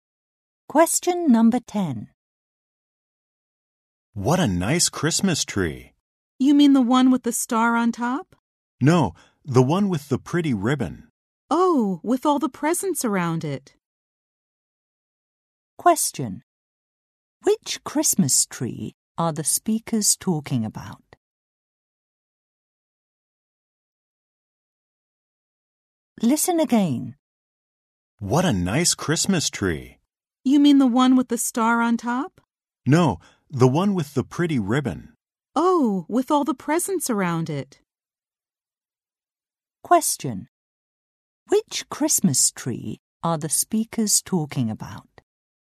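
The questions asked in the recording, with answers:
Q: Question.Which Christmas tree are the speakers talking about?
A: The one with the pretty ribbon and presents around it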